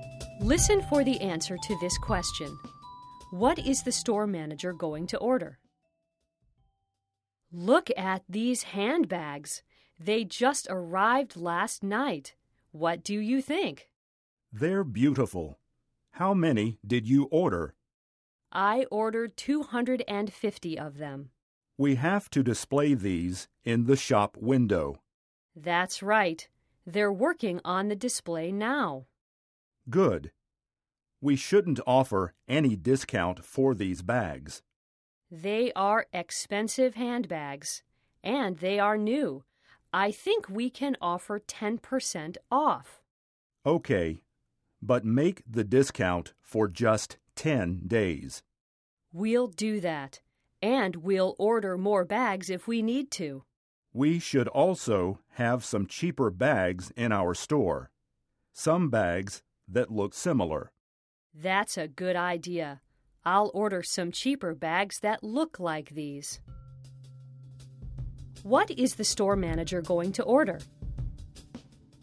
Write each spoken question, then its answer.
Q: What is the store manager going to order?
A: She is going to order cheaper handbags.